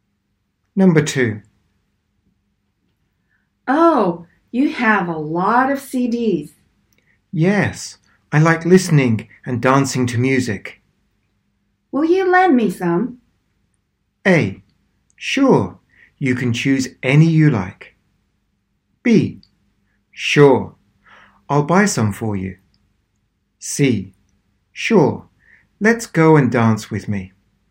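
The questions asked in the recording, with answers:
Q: Will you lend me some?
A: A: Sure, you can choose any you like.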